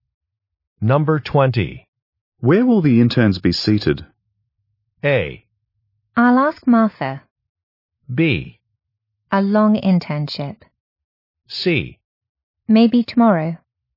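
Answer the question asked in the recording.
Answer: A: I'll ask Martha.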